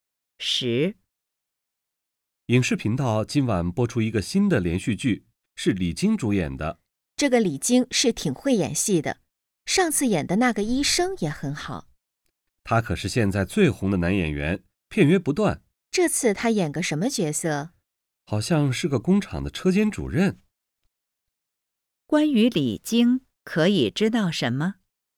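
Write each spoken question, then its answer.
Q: 关于李菁,可以知道什么?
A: 他是现在最红的男演员,片约不断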